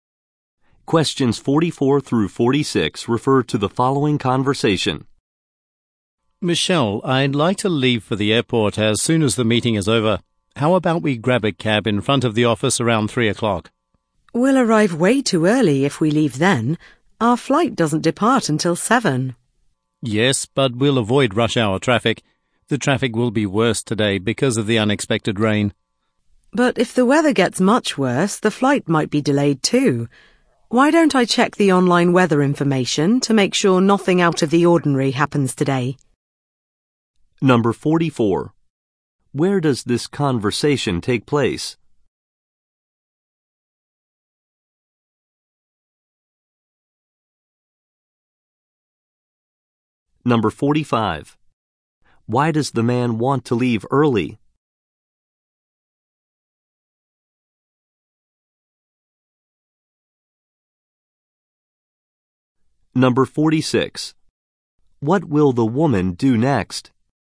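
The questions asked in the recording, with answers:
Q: Why does the man want to leave early?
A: To avoid rush hour traffic

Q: What will the woman do next?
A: Check the weather online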